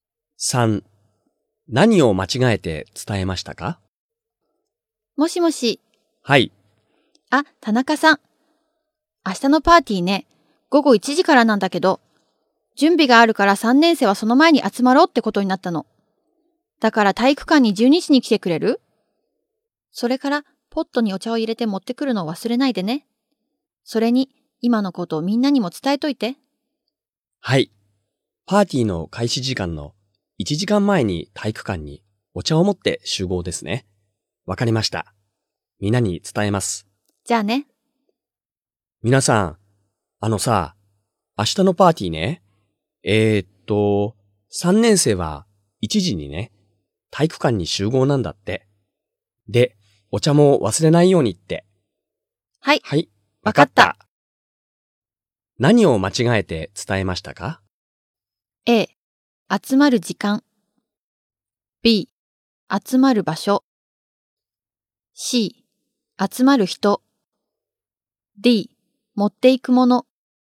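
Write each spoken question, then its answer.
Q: 何を間違えて伝えましたか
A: A: 集まる時間。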